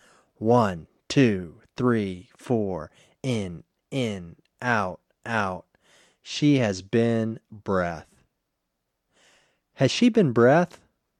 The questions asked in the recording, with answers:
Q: Has she been breath?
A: Yes, she has been breath.